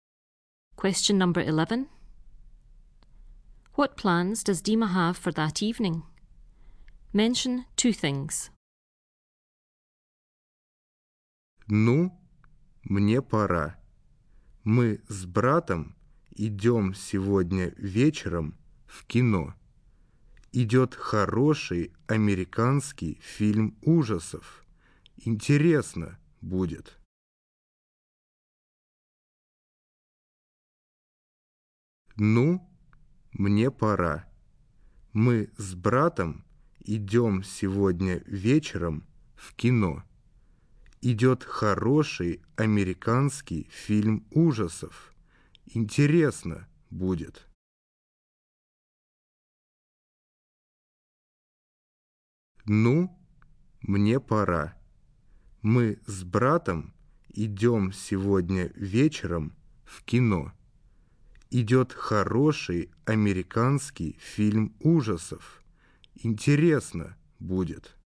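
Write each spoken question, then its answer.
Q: What plans does Dima have for that evening?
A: Going to the cinema with his brother to see an American horror film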